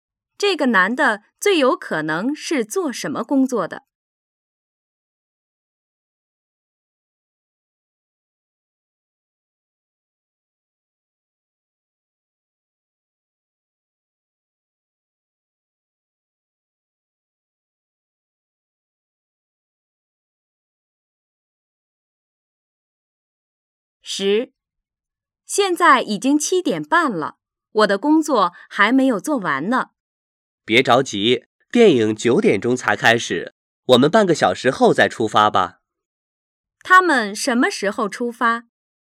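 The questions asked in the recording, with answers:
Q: 他们什么时候出发?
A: 8点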